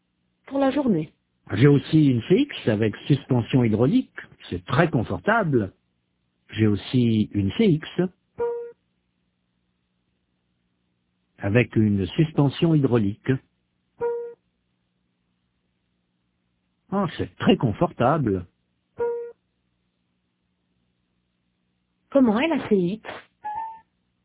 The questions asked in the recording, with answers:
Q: Comment est la CX?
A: Très confortable.